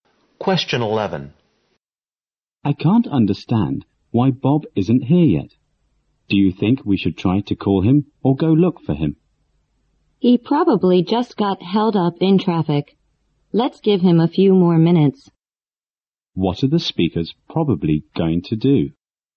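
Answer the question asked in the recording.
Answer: Wait a few more minutes for Bob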